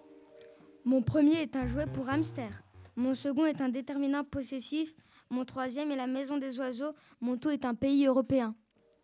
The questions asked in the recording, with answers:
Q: Mon tout est un pays européen.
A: La réponse est la Roumanie.